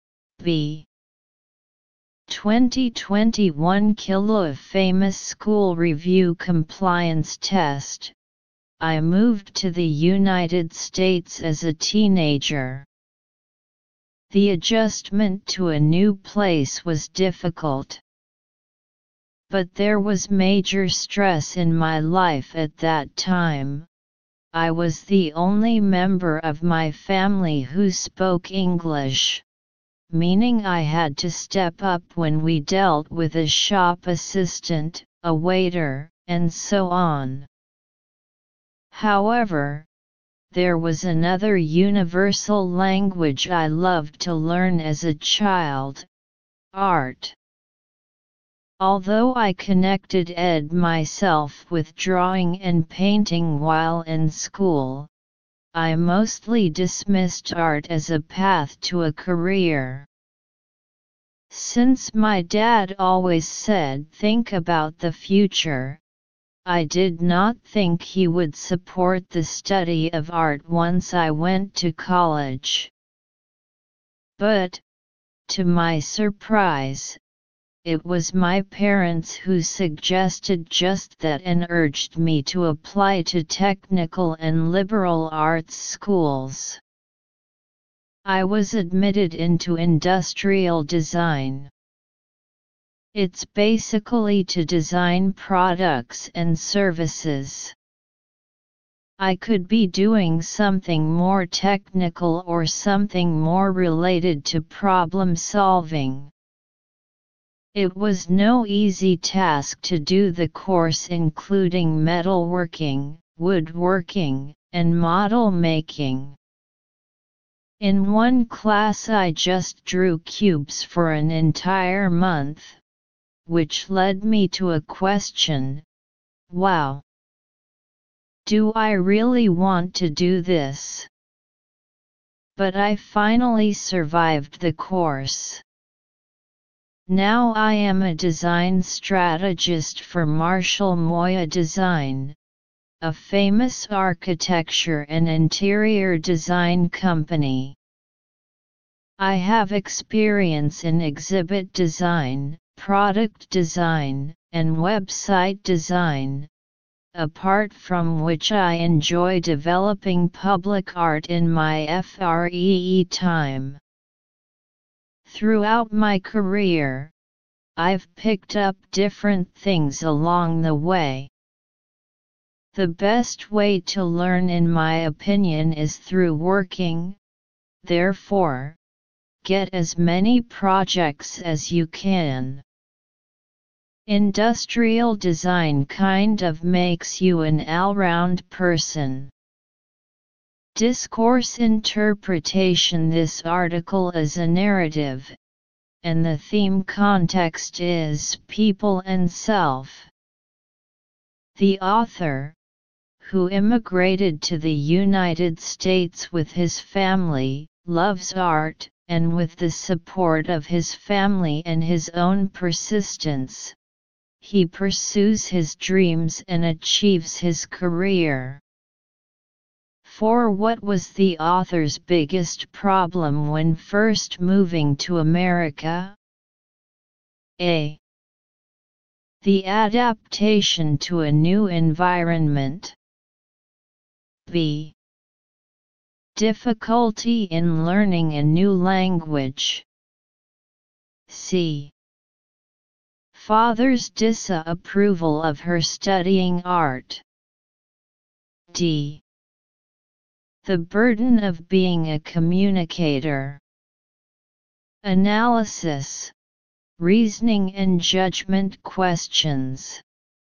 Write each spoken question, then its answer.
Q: what was the author's biggest problem when first moving to America?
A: Answer D.